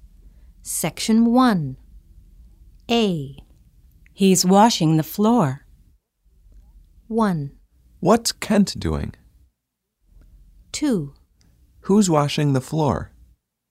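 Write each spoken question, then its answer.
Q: He's washing the floor.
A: 1: What's Kent doing?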